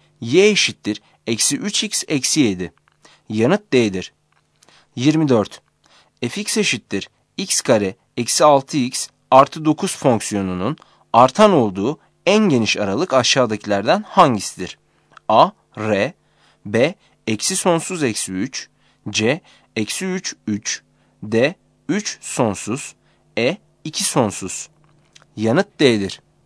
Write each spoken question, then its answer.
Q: Fx eşittir x kare eksi 6x artı 9 fonksiyonunun artan olduğu en geniş aralık aşağıdakilerden hangisidir?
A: Yanıt D'dir.